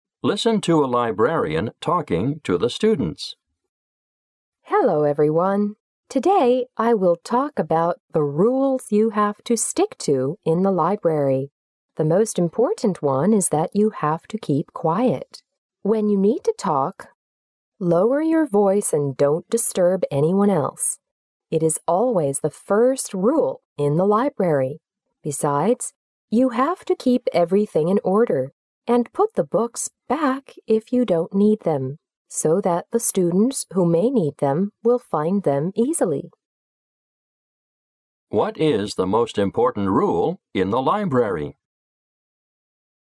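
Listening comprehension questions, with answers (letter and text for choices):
What is the most important rule in the library?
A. To keep a quiet atmosphere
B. To put everything in order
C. To return the books on time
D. Not to talk to anyone else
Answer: A. To keep a quiet atmosphere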